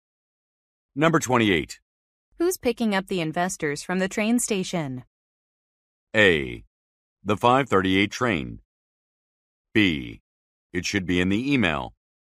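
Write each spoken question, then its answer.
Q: Who's picking up the investors from the train station?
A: B: It should be in the email.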